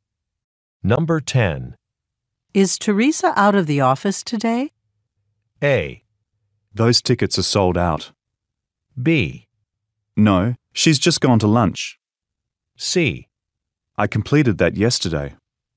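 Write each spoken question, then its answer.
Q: Is Teresa out of the office today?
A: B: No, she's just gone to lunch.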